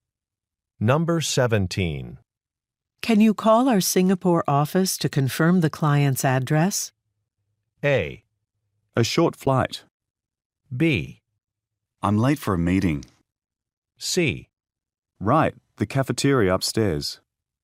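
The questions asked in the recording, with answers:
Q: Can you call our Singapore office to confirm the client's address?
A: B: I'm late for a meeting.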